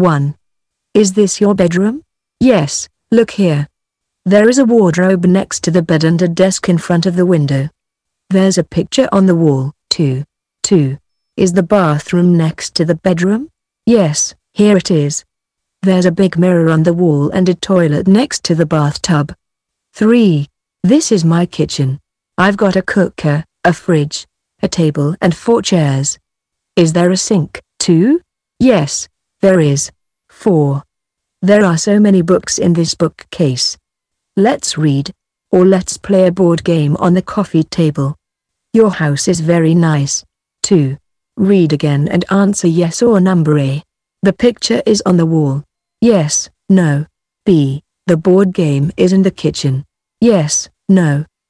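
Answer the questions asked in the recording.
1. Yes
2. No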